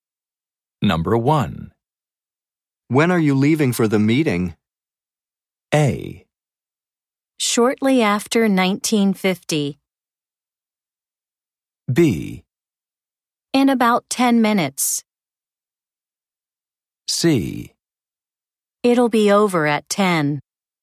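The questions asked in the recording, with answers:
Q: When are you leaving for the meeting?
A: B: In about 10 minutes.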